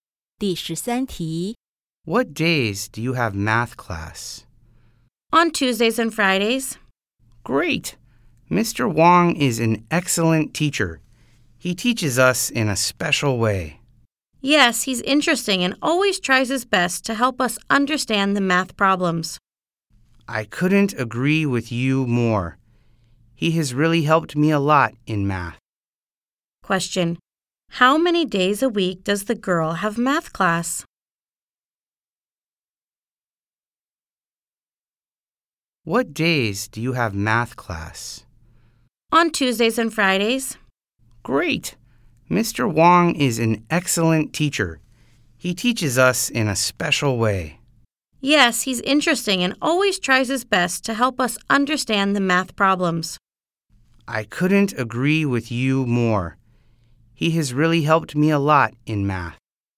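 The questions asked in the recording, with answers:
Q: How many days a week does the girl have math class?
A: Two days (Tuesdays and Fridays)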